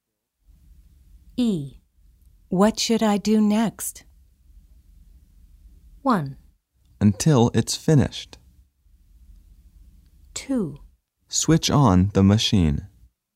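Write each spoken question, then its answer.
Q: What should I do next?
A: 2: Switch on the machine.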